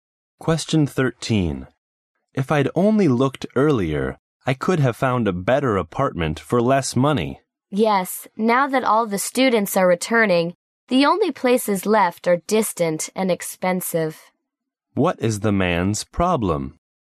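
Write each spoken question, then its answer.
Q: What is the man's problem?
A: He looked too late, so only distant and expensive apartments are left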